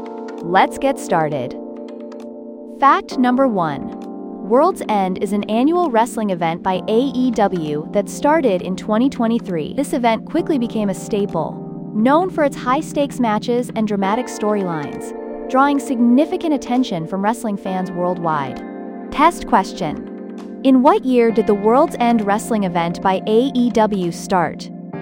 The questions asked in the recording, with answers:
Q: In what year did the World's End wrestling event by AEW start?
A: Correct answer, 2023.